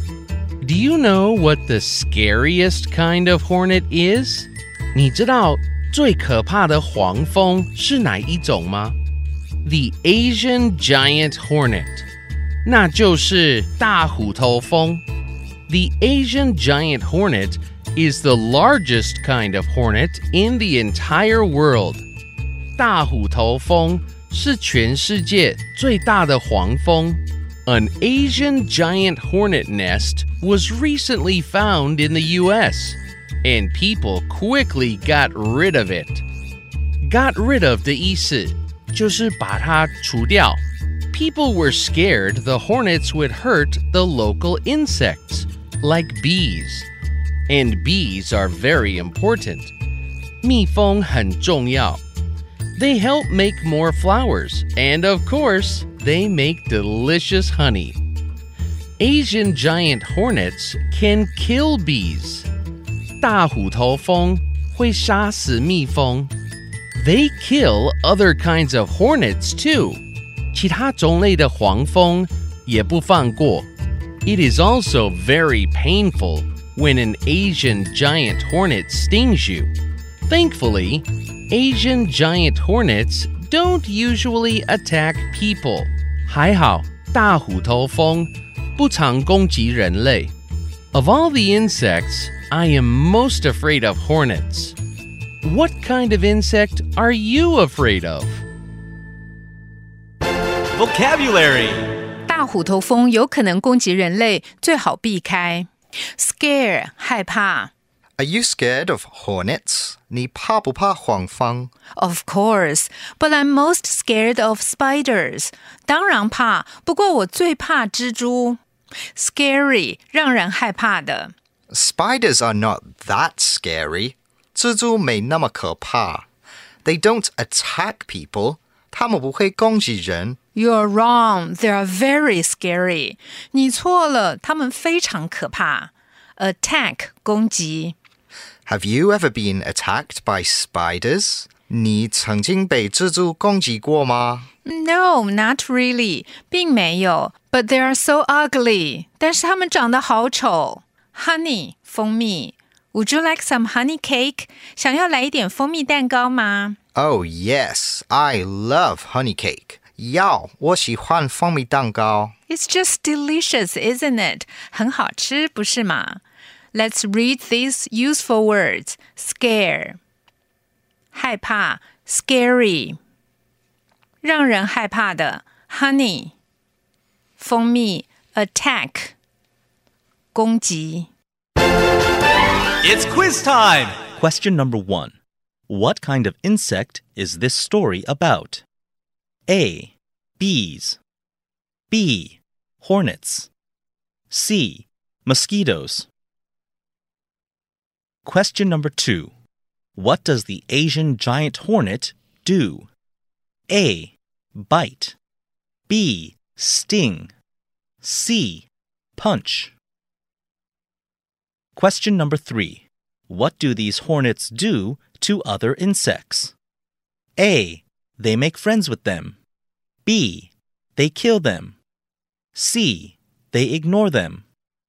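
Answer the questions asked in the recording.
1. B: Hornets.
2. B: Sting.
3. B: They kill them.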